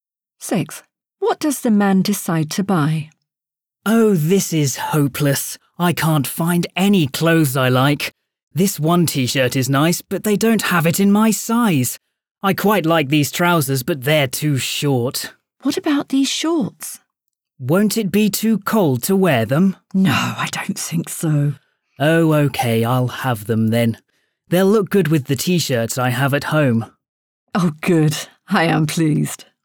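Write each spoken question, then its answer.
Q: What does the man decide to buy?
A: shorts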